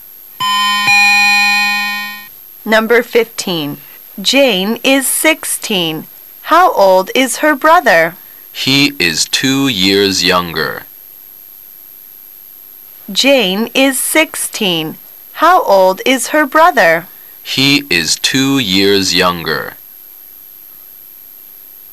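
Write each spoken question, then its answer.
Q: How old is her brother?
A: 14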